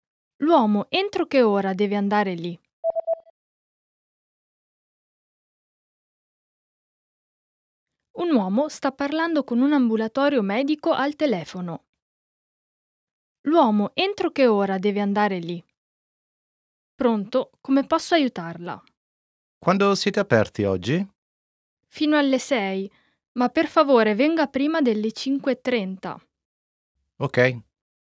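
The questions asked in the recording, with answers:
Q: L'uomo, entro che ora deve andare lì?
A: Prima delle 5:30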